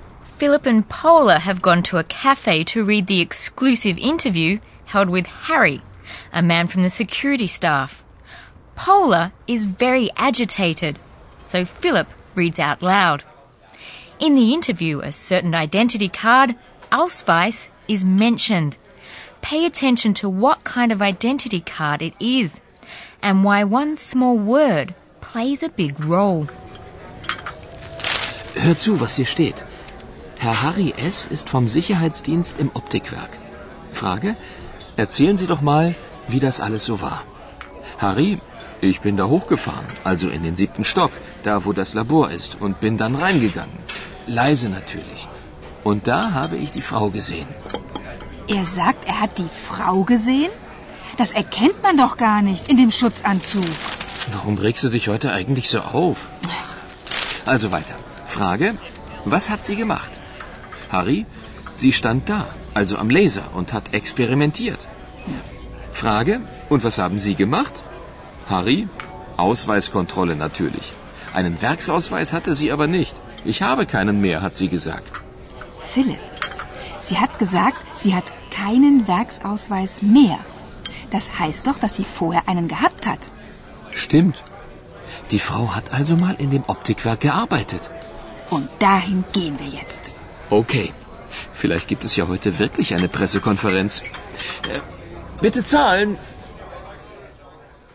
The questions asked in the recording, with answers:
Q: Pay attention to what kind of identity card it is and why one small word plays a big role.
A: It means that the woman must once have had a factory identity card, and thus that she used to work in the optics factory.